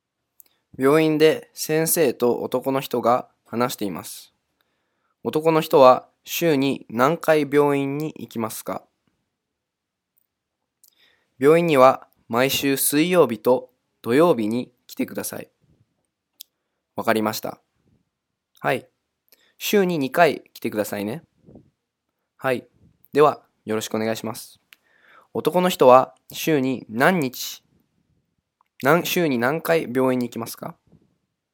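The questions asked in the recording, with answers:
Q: 男の人は週に何回病院に行きますか?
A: 週に2回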